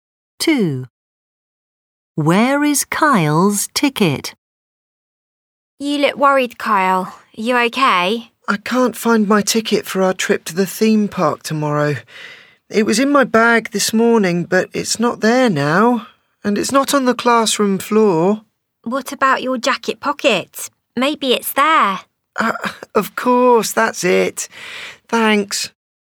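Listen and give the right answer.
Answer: In his jacket pocket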